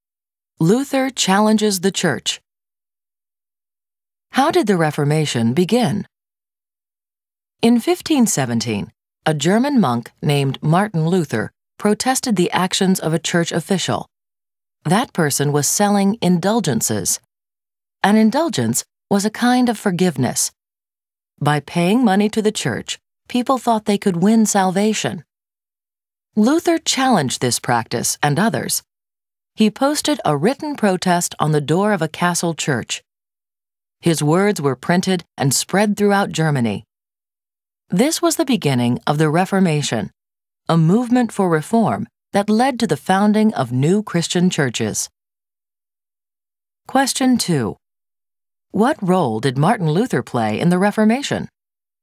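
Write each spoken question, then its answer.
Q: What role did Martin Luther play in the Reformation?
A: He protested the selling of indulgences, starting the Reformation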